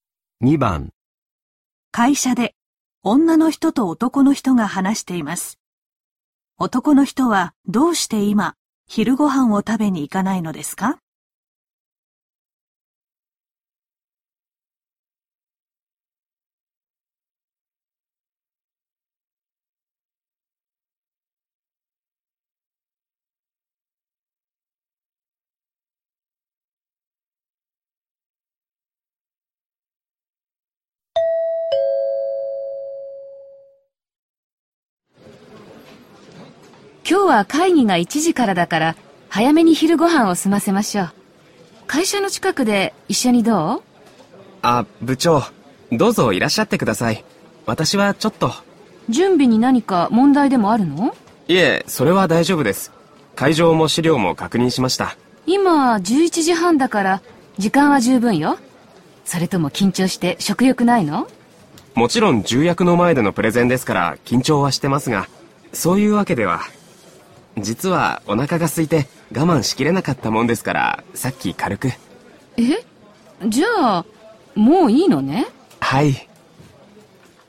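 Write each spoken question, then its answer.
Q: 男の人はどうして今昼ご飯を食べに行かないのですか?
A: さっきもう軽く食べたから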